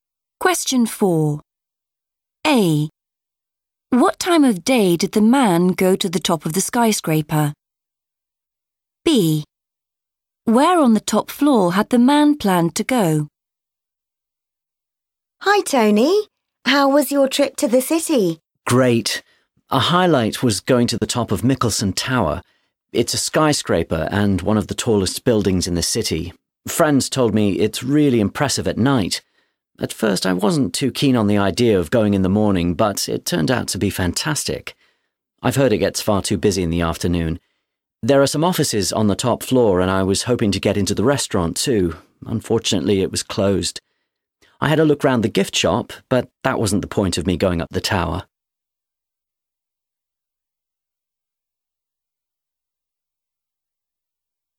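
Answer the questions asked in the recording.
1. in the morning
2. the restaurant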